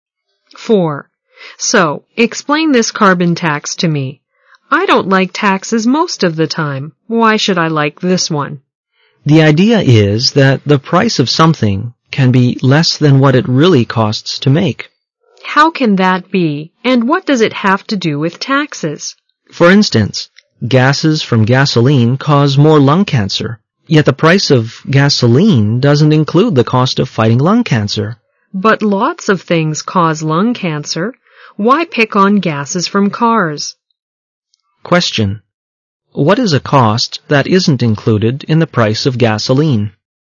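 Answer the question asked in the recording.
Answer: The cost of fighting lung cancer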